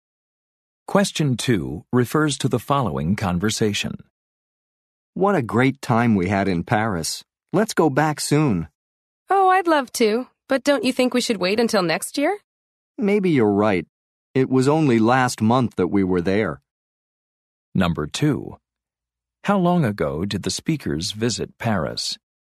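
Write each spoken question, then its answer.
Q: How long ago did the speakers visit Paris?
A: Last month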